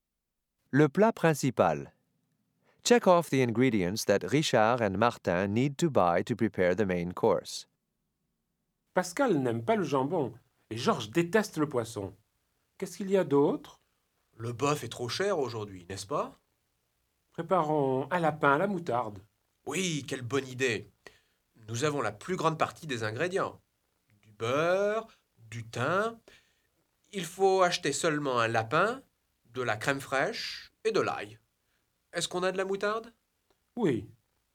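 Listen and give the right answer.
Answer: A rabbit, crème fraîche and garlic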